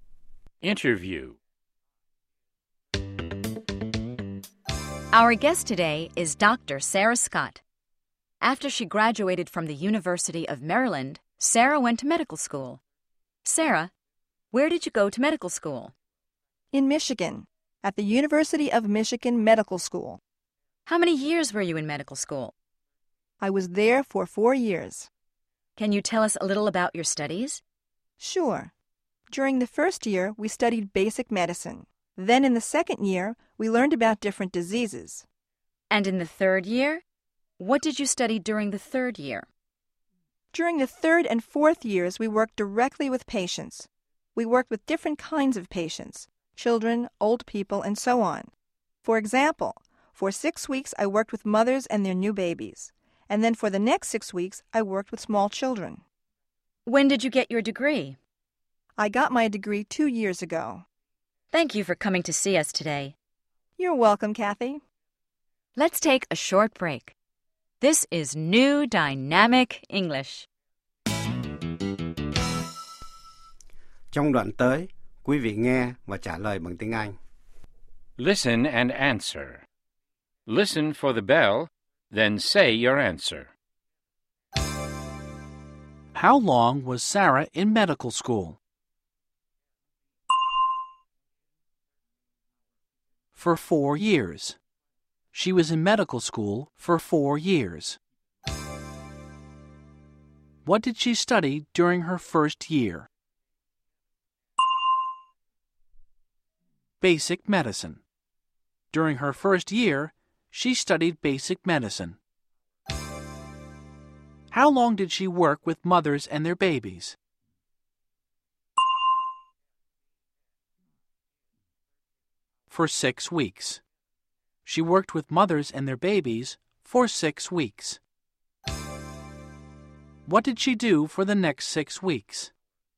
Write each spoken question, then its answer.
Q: How long was Sarah in medical school?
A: For 4 years. She was in medical school for 4 years.

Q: What did she study during her first year?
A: Basic medicine. During her first year, she studied basic medicine.

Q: What did she do for the next 6 weeks?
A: She worked with small children.